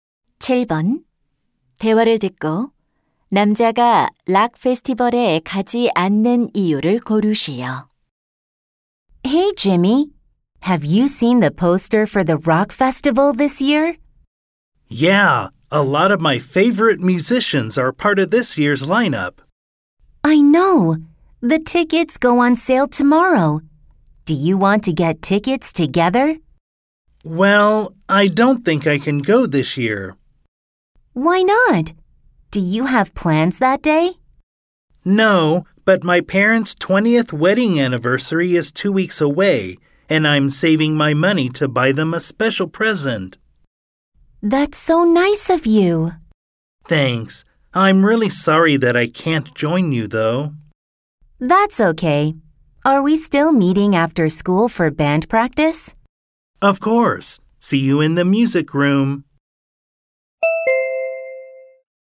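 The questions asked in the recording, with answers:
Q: 대화를 듣고 남자가 락 페스티벌에 가지 않는 이유를 고르시오.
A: 부모님 결혼기념일 선물을 사기 위해 돈을 모으고 있어서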